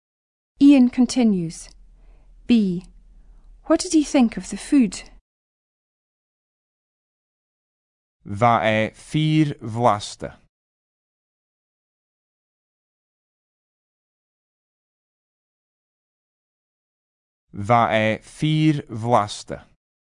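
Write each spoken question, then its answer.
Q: B. What did he think of the food?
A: It was really tasty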